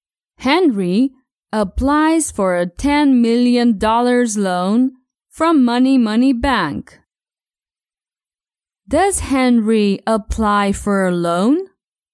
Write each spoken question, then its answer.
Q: Does Henry apply for a loan?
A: Yes, Henry applies for a $10 million loan.